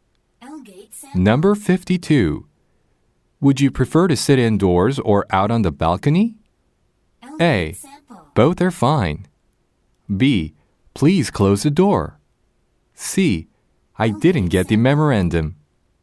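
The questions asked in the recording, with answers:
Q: Would you prefer to sit indoors or out on the balcony?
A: A: Both are fine.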